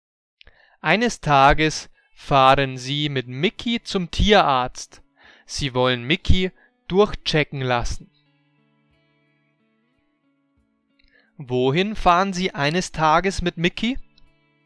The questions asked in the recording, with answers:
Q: Wohin fahren Sie eines Tages mit Mickey?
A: Zum Tierarzt. Sie fahren eines Tages mit Mickey zum Tierarzt.